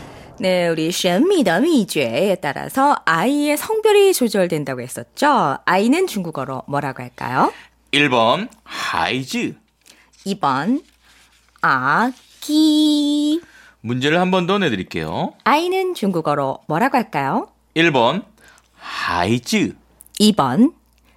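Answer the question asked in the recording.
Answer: 1번: 하이즈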